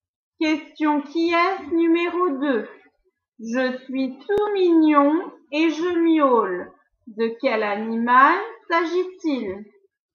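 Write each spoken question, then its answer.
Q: De quel animal s'agit-il?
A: le chat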